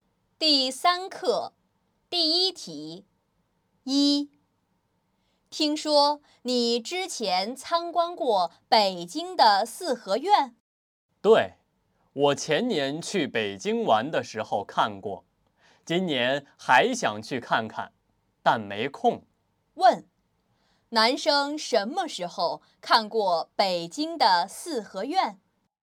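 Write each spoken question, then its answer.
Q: 男生什么时候看过北京的四合院?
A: 前年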